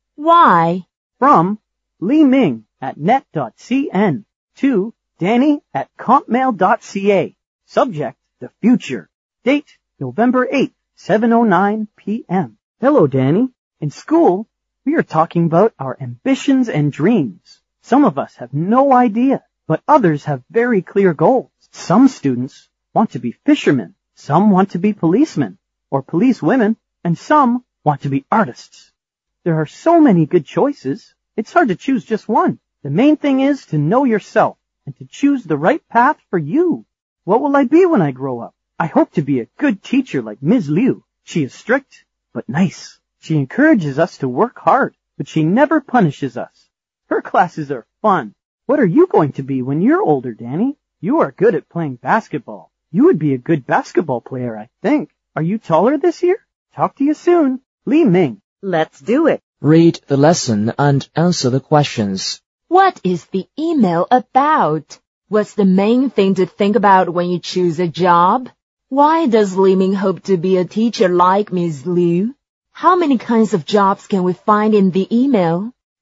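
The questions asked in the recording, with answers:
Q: What is the email about?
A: Ambitions and dreams for the future

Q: What's the main thing to think about when you choose a job?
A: To know yourself and choose the right path for you

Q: Why does Li Ming hope to be a teacher like Ms. Liu?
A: She is strict but nice, encourages them to work hard, never punishes them, and her classes are fun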